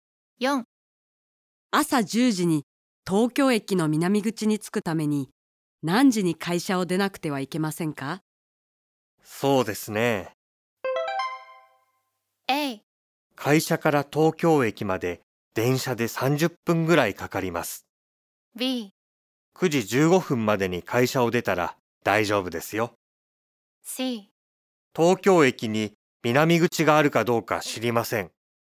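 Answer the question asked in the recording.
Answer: B: 9時15分までに会社を出たら大丈夫ですよ。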